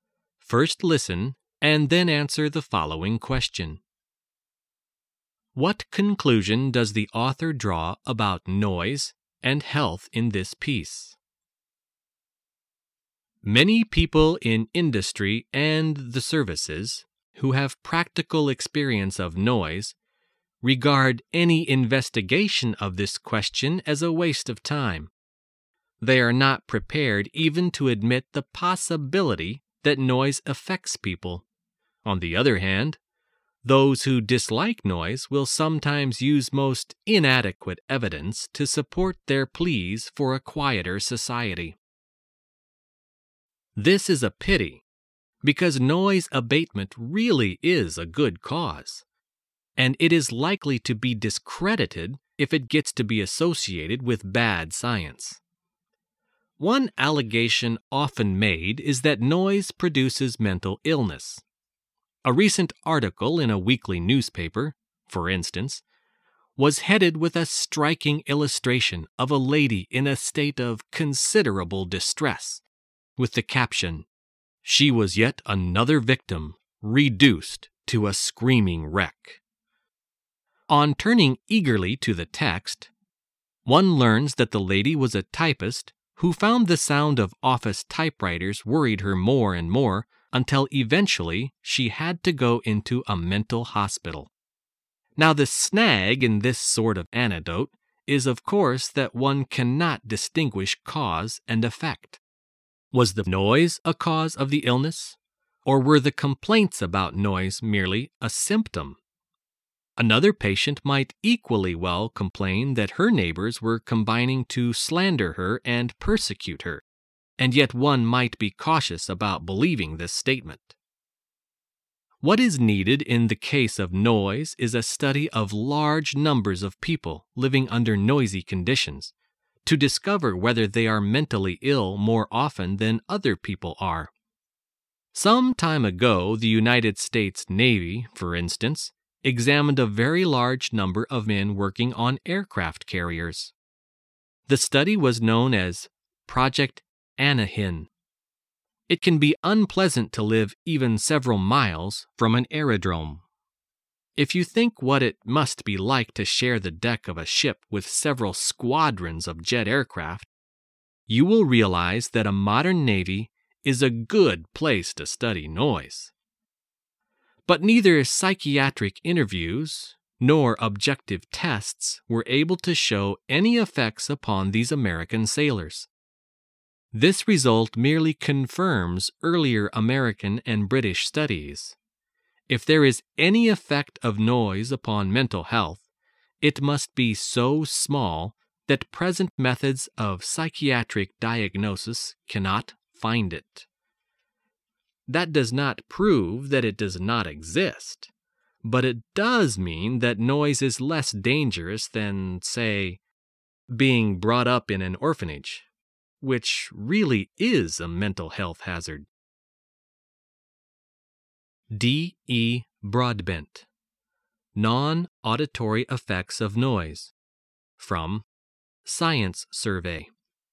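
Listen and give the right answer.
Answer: Any effect of noise on mental health is too small to detect with present methods; noise is less dangerous than often claimed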